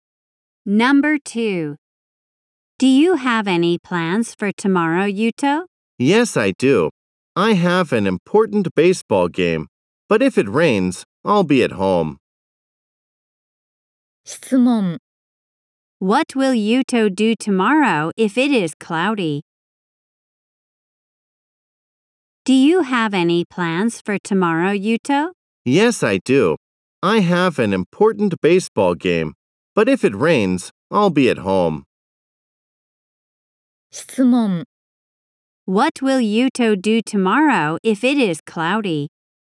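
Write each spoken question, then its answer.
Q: What will Yuto do tomorrow if it is cloudy?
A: He will play in a baseball game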